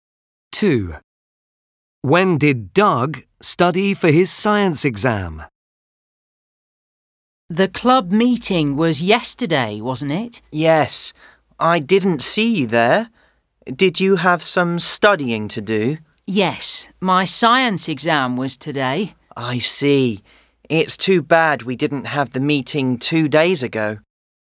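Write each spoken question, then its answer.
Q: When did Doug study for his science exam?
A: yesterday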